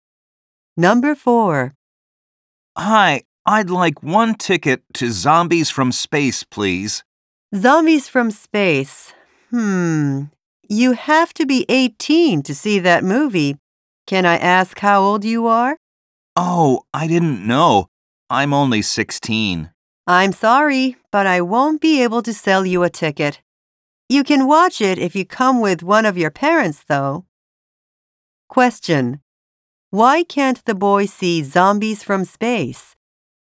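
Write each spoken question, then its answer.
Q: Why can't the boy see Zombies from Space?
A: He is too young (under 18).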